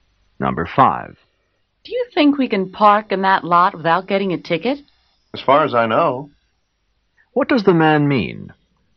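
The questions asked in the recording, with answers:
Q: What does the man mean?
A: He thinks they can park there without getting a ticket.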